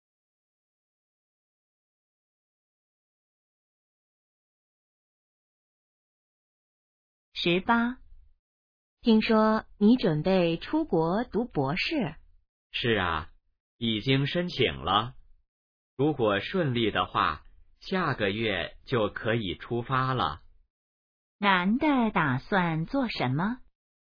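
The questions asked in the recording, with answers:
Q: 男的打算做什么?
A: 出国读博士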